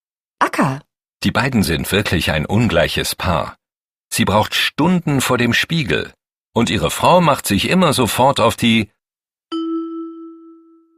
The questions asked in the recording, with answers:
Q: Und ihre Frau macht sich immer sofort auf die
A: Socken.